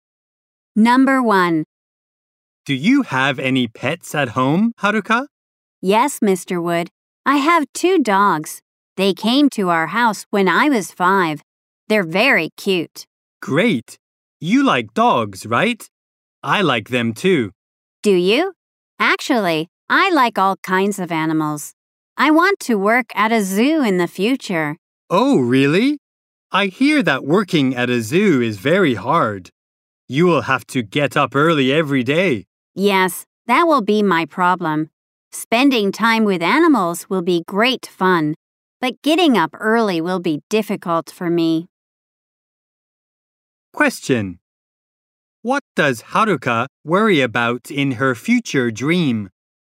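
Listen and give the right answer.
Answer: Getting up early every day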